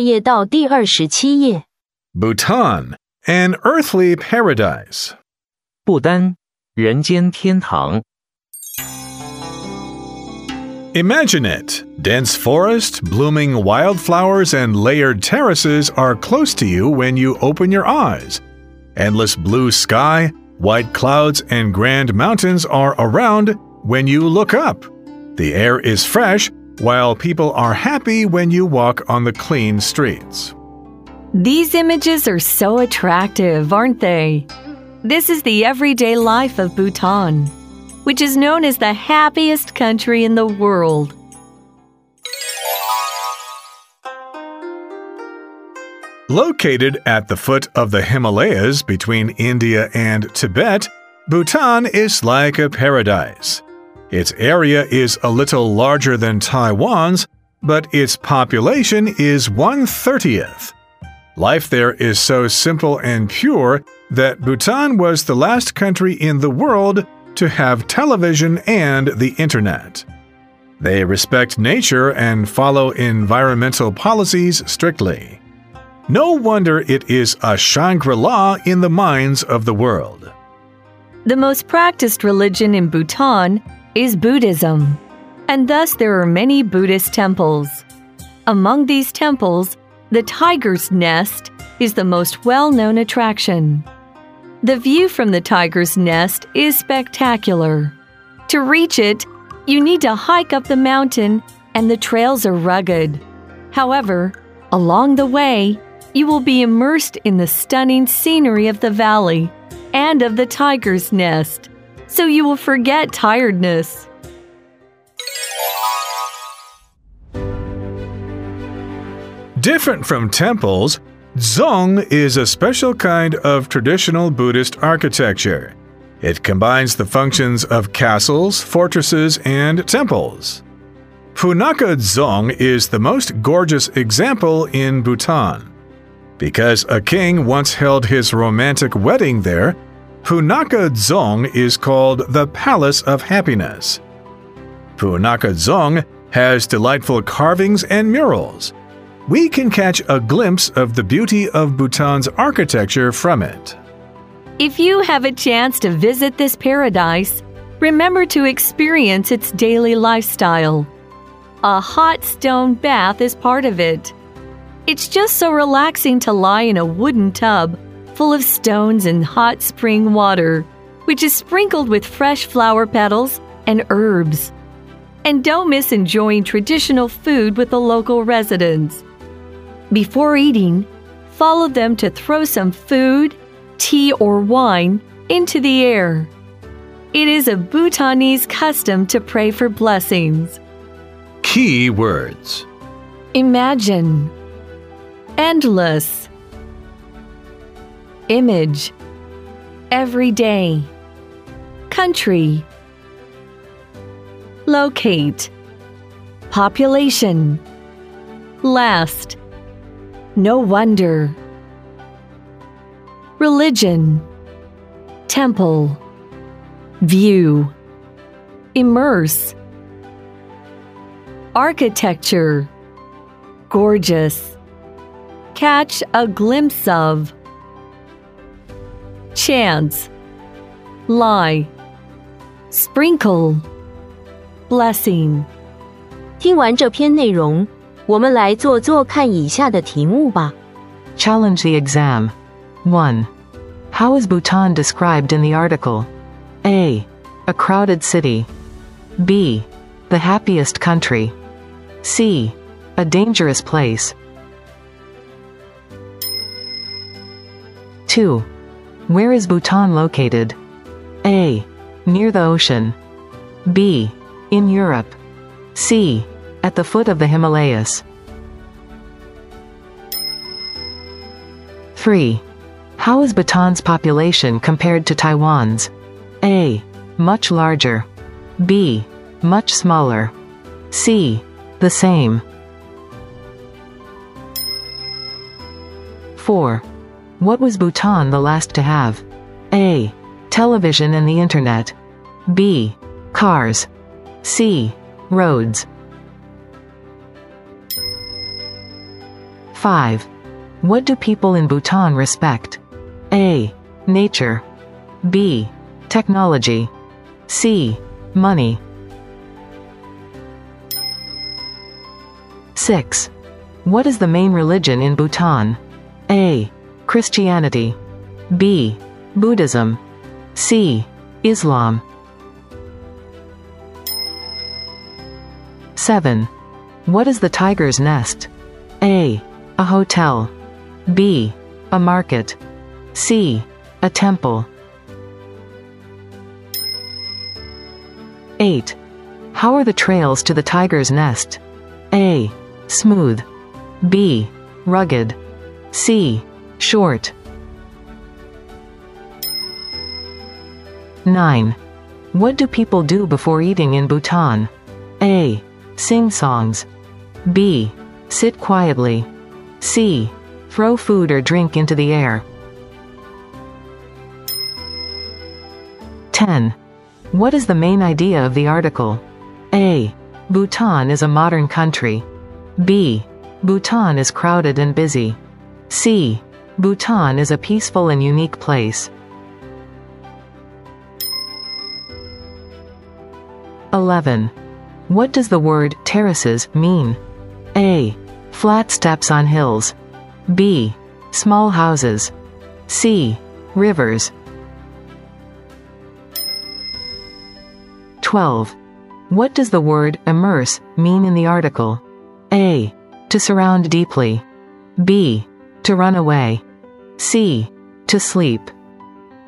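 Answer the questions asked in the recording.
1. B: The happiest country.
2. C: At the foot of the Himalayas.
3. B: Much smaller.
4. A: Television and the internet.
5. A: Nature.
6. B: Buddhism.
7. C: A temple.
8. B: Rugged.
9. C: Throw food or drink into the air.
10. C: Bhutan is a peaceful and unique place.
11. A: Flat steps on hills.
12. A: To surround deeply.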